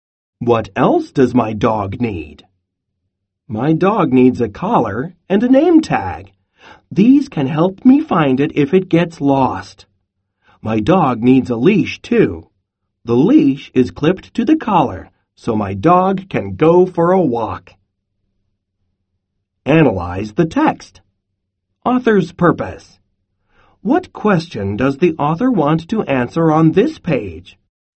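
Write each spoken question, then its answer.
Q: What question does the author want to answer on this page?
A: What else does my dog need?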